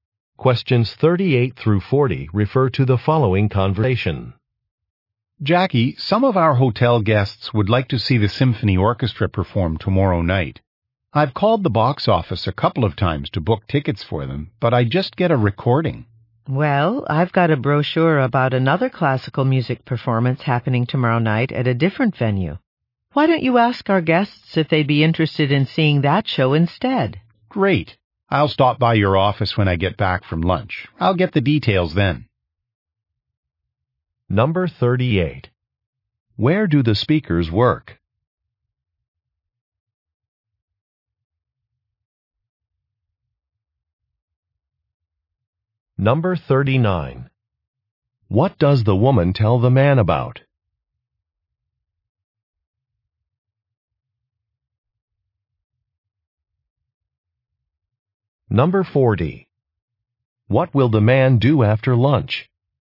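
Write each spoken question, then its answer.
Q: Where do the speakers work?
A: At a hotel

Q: What does the woman tell the man about?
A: Another classical music performance

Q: What will the man do after lunch?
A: Stop by the woman's office to get details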